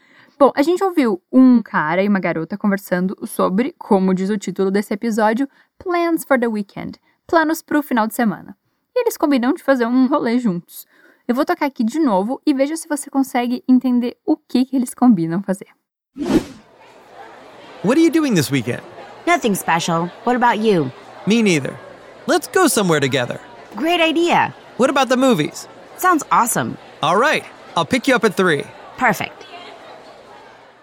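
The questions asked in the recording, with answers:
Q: Eu vou tocar aqui de novo e veja se você consegue entender o que, que eles combinam fazer.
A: Ir ao cinema juntos (ele vai buscá-la às três)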